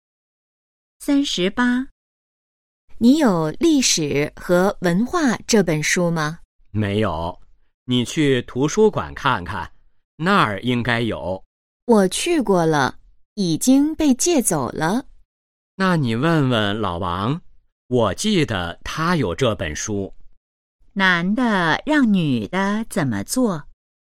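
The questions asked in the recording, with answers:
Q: 男的让女的怎么做?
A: 去问问老王(借《历史和文化》这本书)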